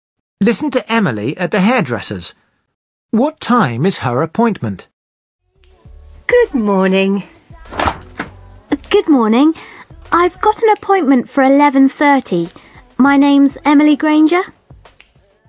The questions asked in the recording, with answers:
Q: What time is her appointment?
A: She says 11:30.